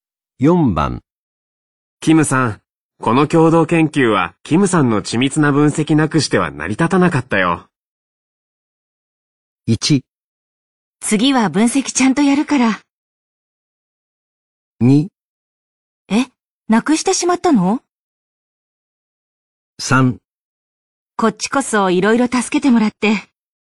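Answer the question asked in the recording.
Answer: 3: こっちこそいろいろ助けてもらって。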